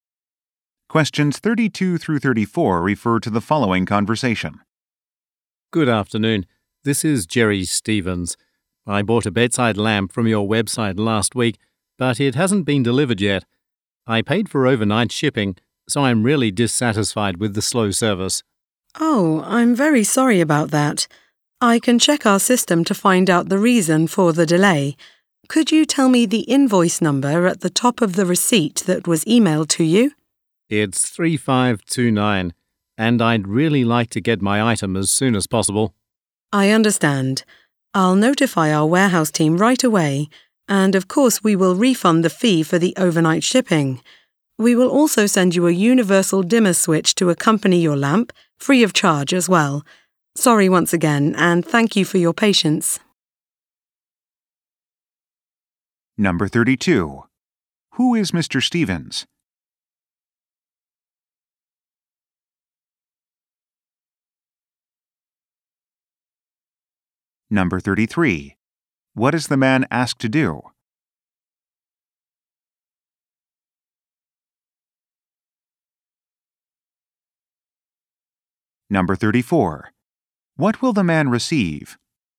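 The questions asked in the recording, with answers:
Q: Who is Mr. Stevens?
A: A customer who bought a lamp online

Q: What is the man asked to do?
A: Give the invoice number

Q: What will the man receive?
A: A free dimmer switch (and a shipping refund)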